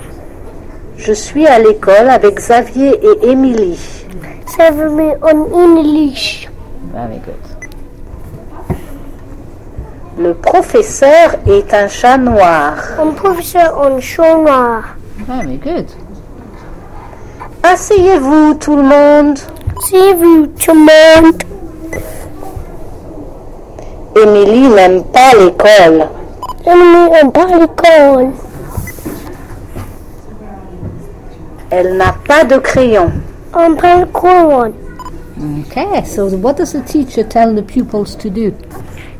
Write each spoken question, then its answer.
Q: Okay, so what does the teacher tell the pupils to do?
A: He said, asseyez-vous tout le monde.